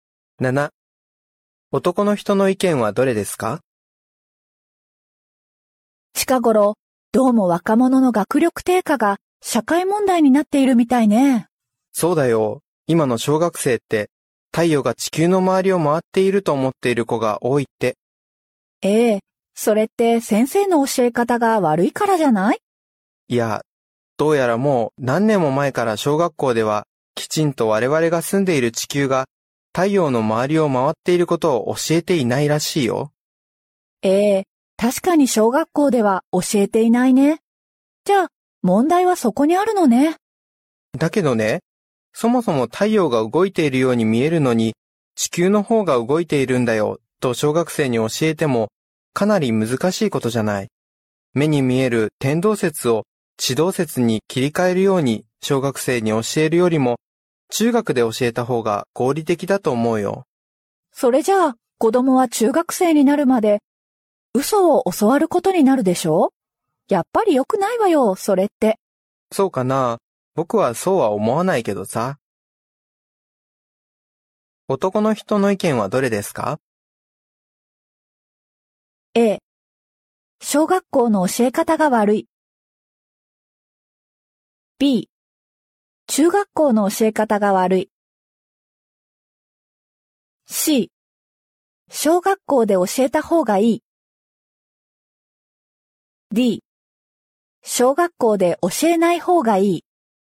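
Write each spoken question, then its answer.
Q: 男の人の意見はどれですか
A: D。小学校で教えない方がいい。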